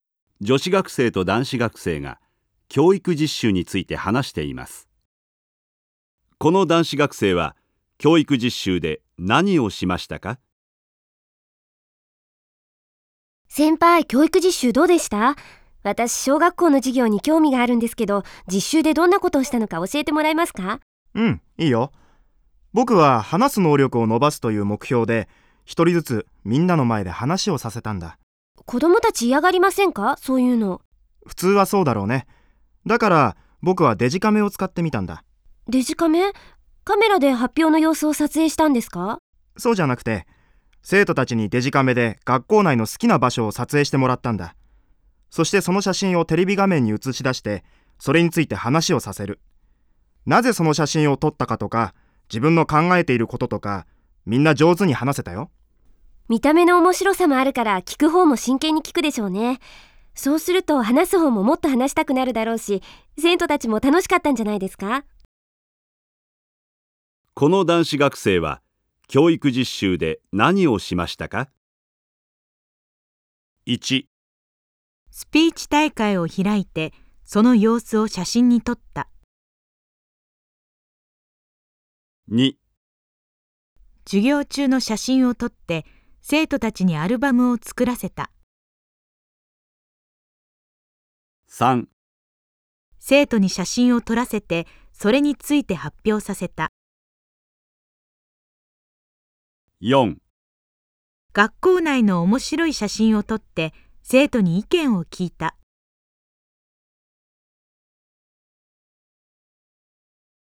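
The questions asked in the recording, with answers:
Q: この男子学生は教育実習で何をしましたか?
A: 3: 生徒に写真を撮らせてそれについて発表させた。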